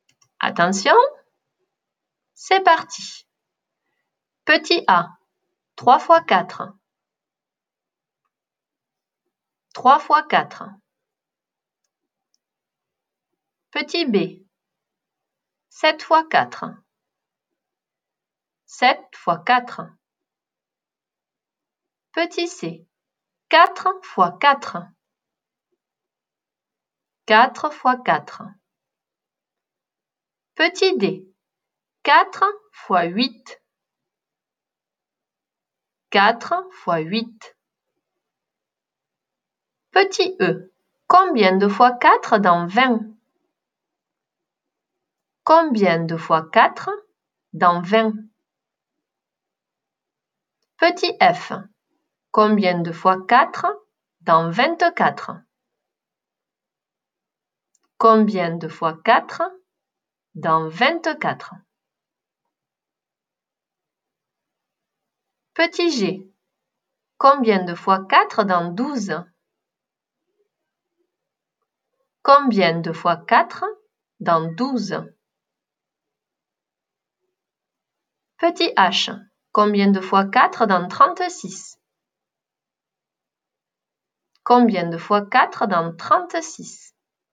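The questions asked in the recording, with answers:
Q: 3 fois 4.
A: 12

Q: 7 fois 4.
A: 28

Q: 4 fois 4.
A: 16

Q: 4 fois 8.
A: 32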